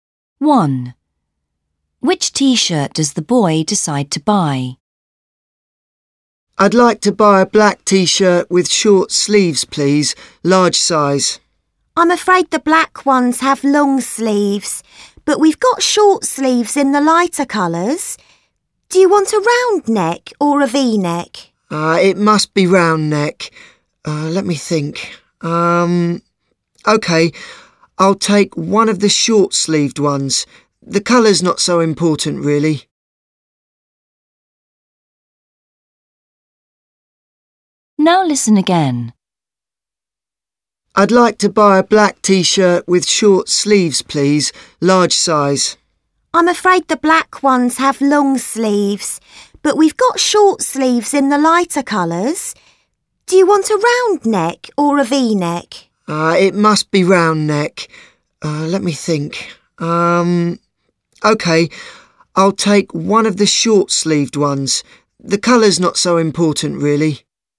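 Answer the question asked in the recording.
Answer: A short-sleeved, round-neck T-shirt in a light colour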